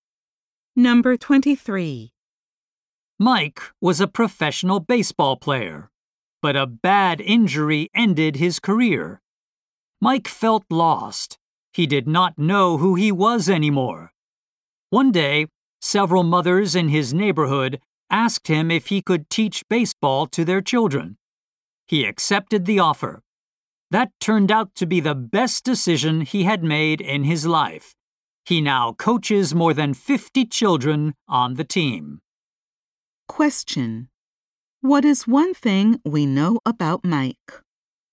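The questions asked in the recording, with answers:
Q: What is one thing we know about Mike?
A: He coaches baseball to over 50 children.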